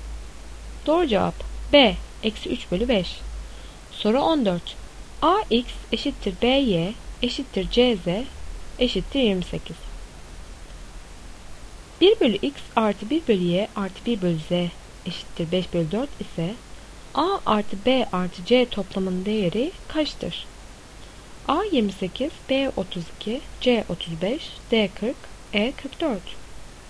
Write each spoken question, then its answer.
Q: 1 bölü x artı 1 bölü y artı 1 bölü z eşittir 5 bölü 4 ise a artı b artı c toplamının değeri kaçtır?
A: Doğru cevap c 35.